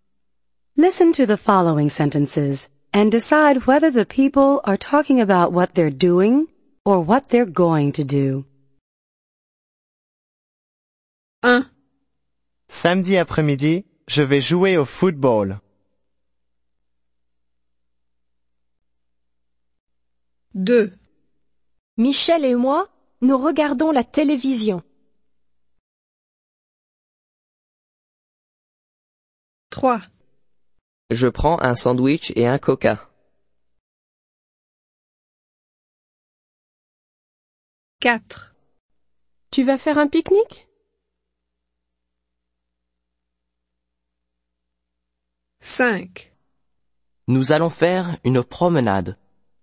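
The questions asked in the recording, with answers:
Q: Listen to the following sentences and decide whether the people are talking about what they're doing or what they're going to do.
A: going to do

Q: Listen to the following sentences and decide whether the people are talking about what they're doing or what they're going to do.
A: doing

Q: Listen to the following sentences and decide whether the people are talking about what they're doing or what they're going to do.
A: doing

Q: Listen to the following sentences and decide whether the people are talking about what they're doing or what they're going to do.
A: going to do

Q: Listen to the following sentences and decide whether the people are talking about what they're doing or what they're going to do.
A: going to do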